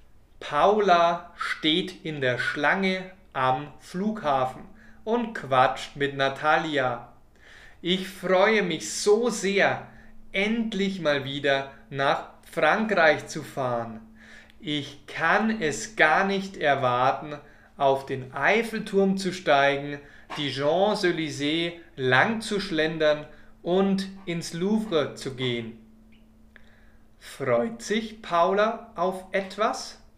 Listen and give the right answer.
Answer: Ja, sie freut sich auf etwas.